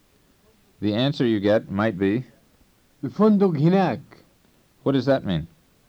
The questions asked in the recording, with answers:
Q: What does that mean?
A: It means the hotel is over there.